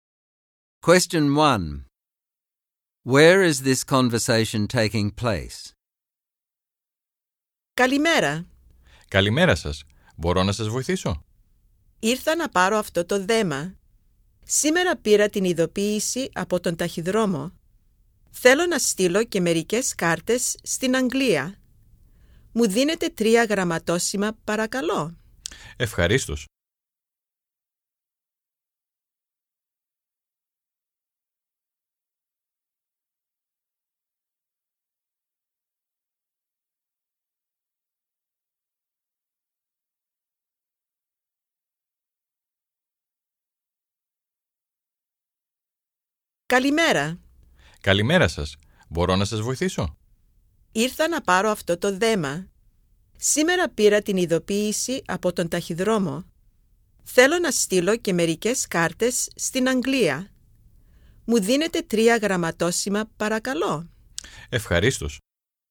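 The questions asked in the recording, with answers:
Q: Where is this conversation taking place?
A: At a post office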